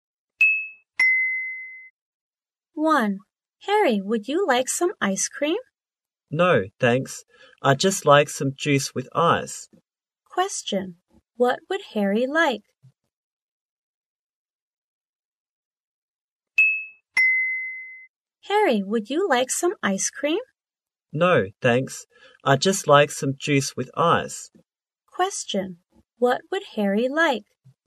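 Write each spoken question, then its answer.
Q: What would Harry like?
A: Some juice with ice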